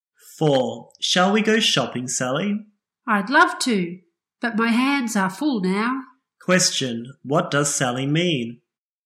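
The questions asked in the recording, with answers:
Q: Question, what does Sally mean?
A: She is busy and can't go shopping now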